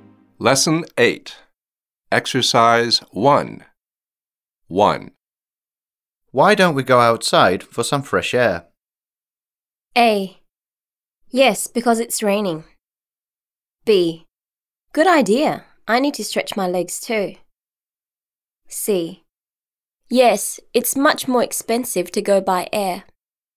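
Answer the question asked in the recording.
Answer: B: Good idea. I need to stretch my legs too.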